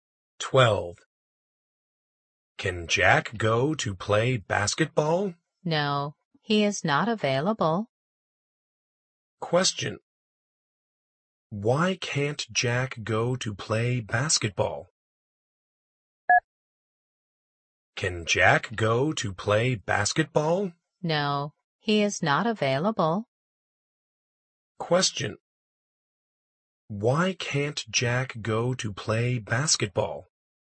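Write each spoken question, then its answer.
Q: Why can't Jack go to play basketball?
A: He is not available (busy).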